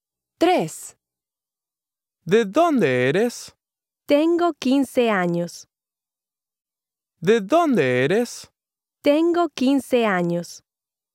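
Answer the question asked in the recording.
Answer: B: not logical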